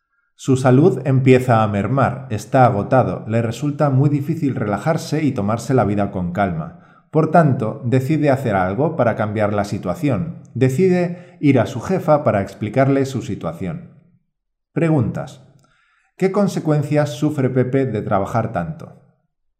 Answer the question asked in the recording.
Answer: Su salud empieza a mermar, está agotado y le resulta difícil tomarse la vida con calma.